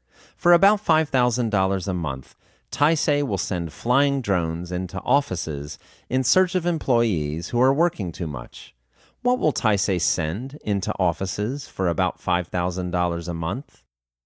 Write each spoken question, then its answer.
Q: What will Taisei send into offices for about $5,000 a month?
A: Taisei will send flying drones into offices for about $5,000 a month.